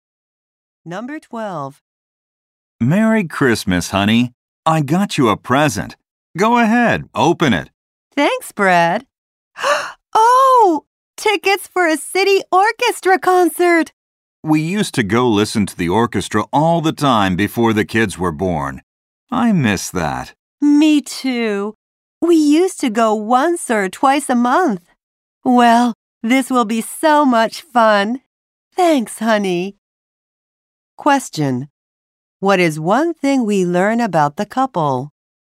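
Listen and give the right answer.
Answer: They often went to orchestra concerts before their kids were born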